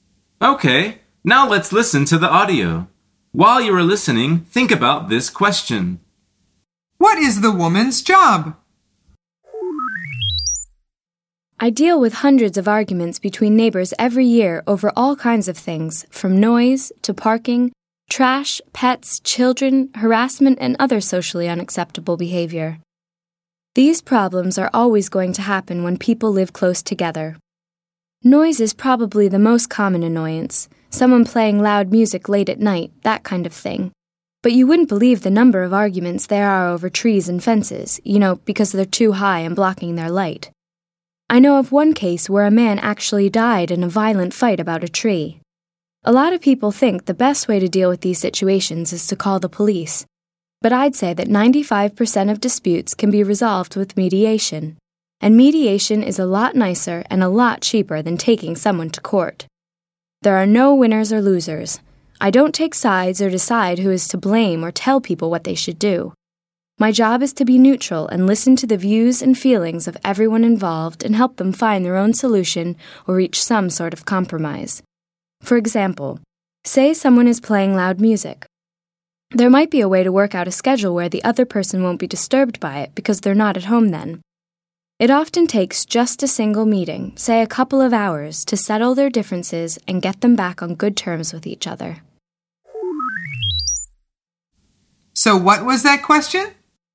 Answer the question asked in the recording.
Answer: The answer is she is a mediator.